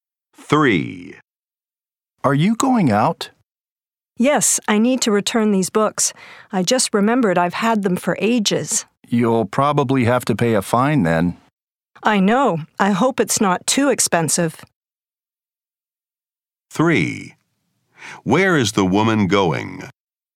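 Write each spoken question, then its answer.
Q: Where is the woman going?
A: To the library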